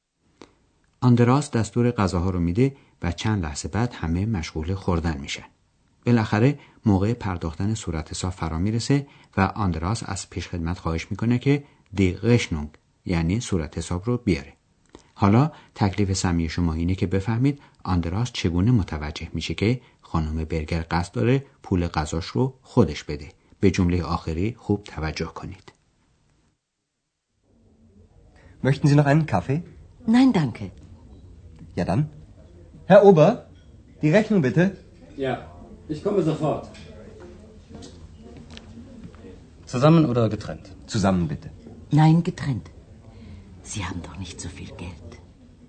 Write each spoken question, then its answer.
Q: حالا تکلیف سمی شما اینه که بفهمید آندراس چگونه متوجه میشه که خانم برگر قصد داره پول غذاش رو خودش بده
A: خانم برگر میخواد سهم خودش از پول میز رو بپردازه و در آلمان این امر غیرعادی نیست.